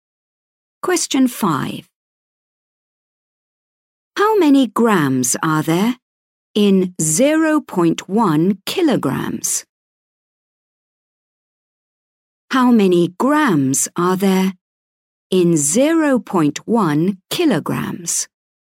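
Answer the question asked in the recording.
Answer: 100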